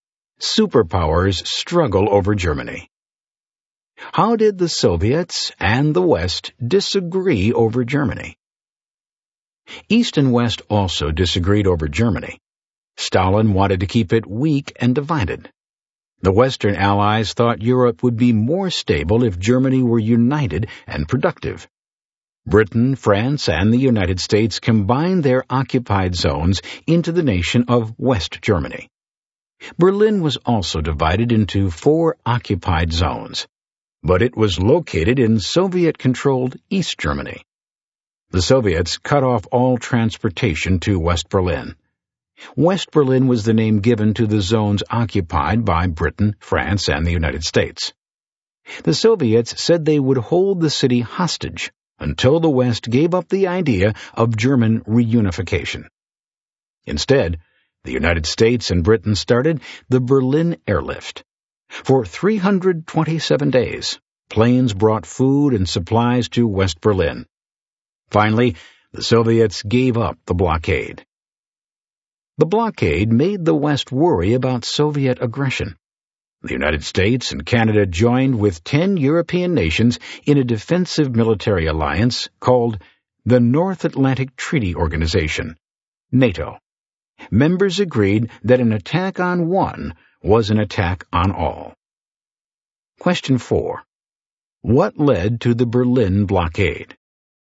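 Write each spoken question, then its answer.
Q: What led to the Berlin blockade?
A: The Western Allies' plan to unite Germany, which Stalin wanted kept weak and divided; the West combined its zones into West Germany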